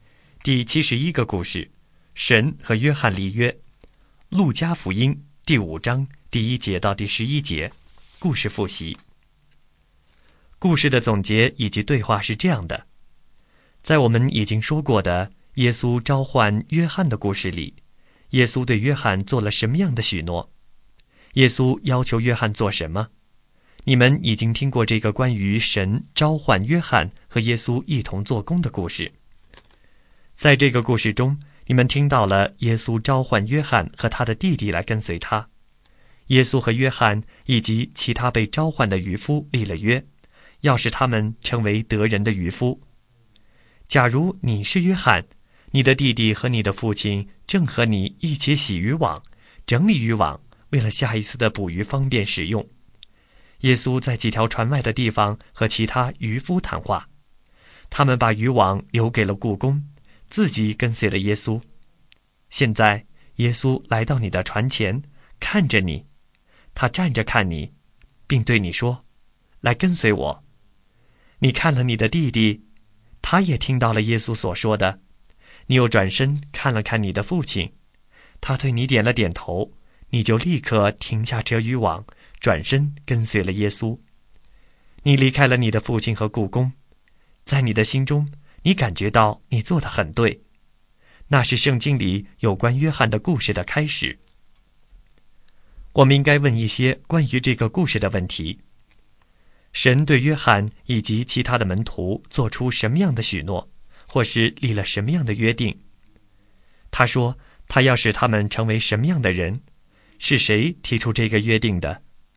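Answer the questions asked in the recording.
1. 要使他们成为得人的渔夫
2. 得人的渔夫
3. 耶稣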